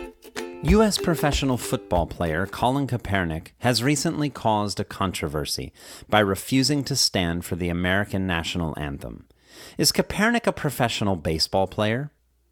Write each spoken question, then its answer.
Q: Is Kaepernick a professional baseball player?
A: No, Kaepernick isn't a professional baseball player.